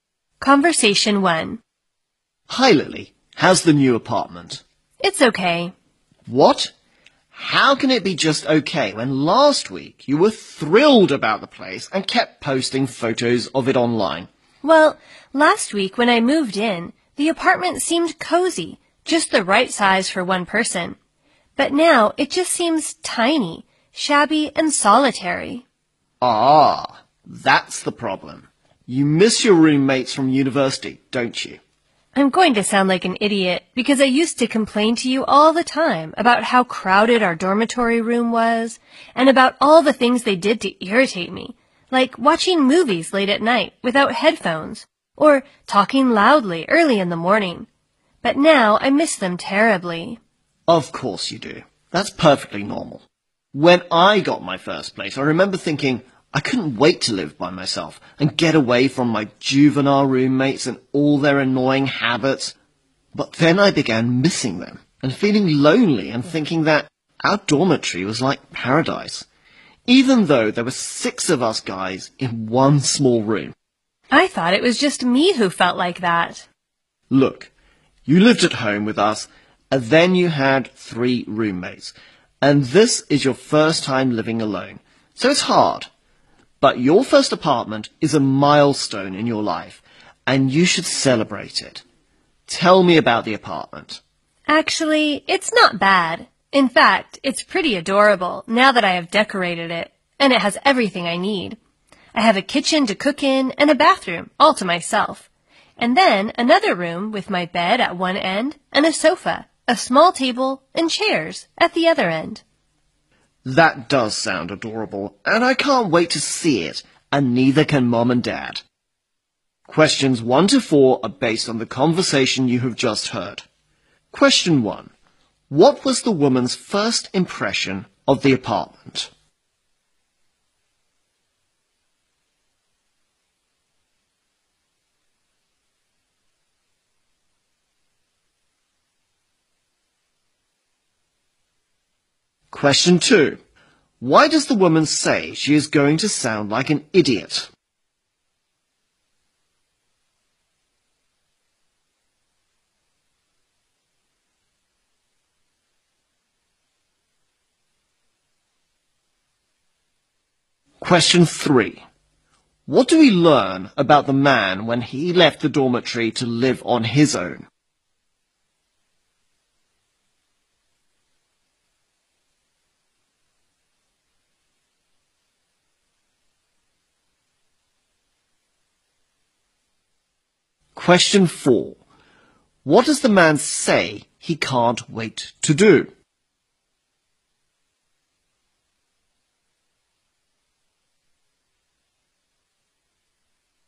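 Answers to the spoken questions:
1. It seemed cozy, just the right size for one person.
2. She used to complain about her crowded dorm and roommates but now misses them terribly.
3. He began missing his roommates and felt lonely.
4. See the woman's apartment.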